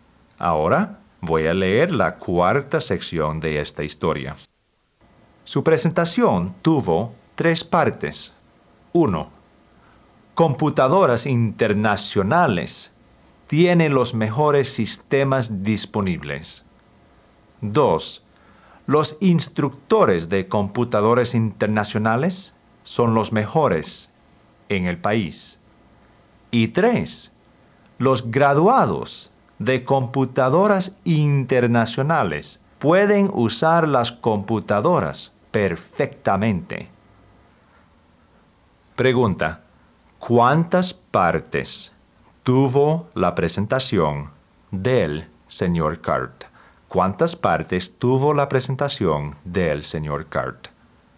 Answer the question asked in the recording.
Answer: Correcto, 3 partes. 3 partes.